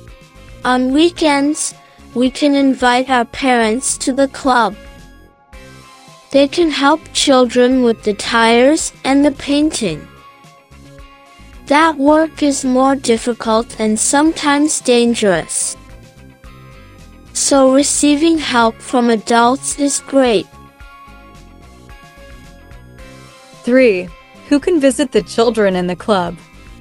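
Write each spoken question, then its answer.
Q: Who can visit the children in the club?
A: Their parents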